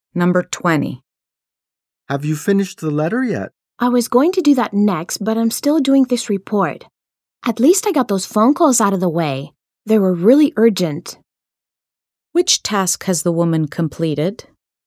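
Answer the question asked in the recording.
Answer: The phone calls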